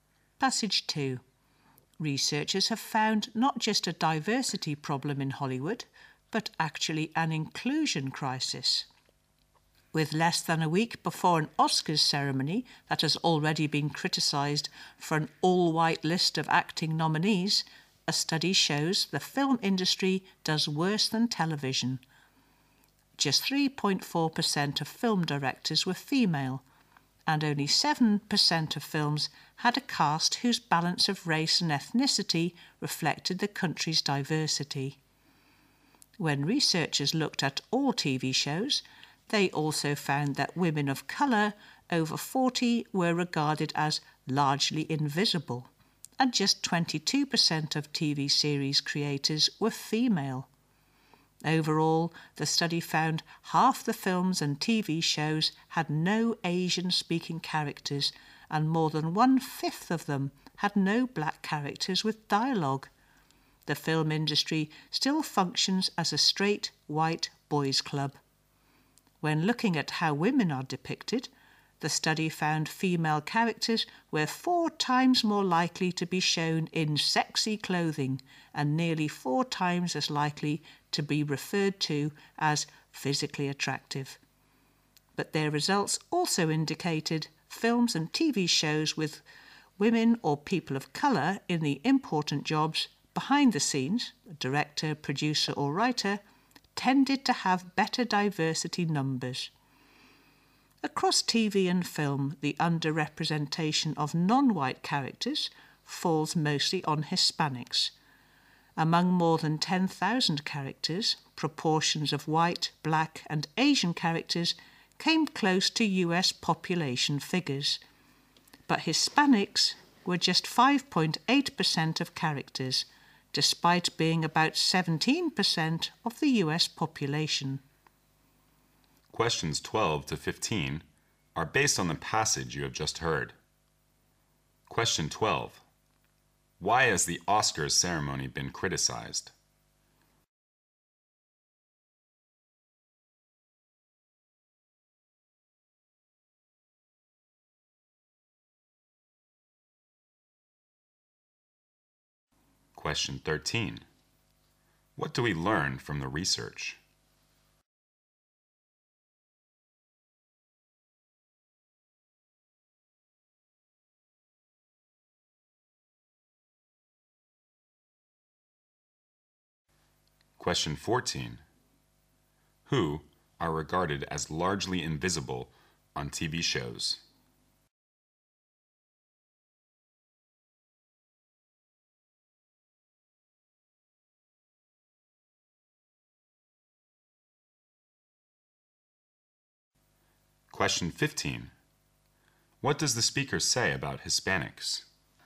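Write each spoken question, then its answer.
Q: Why has the Oscars ceremony been criticized?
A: All its acting nominees are white

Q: Who are regarded as largely invisible on TV shows?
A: Women of colour over 40

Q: What does the speaker say about Hispanics?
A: They are underrepresented: only 5.8% of characters but about 17% of the population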